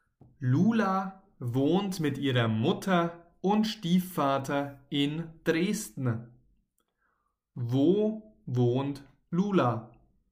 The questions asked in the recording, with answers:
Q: Wo wohnt Lula?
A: in Dresden. Lula wohnt in Dresden.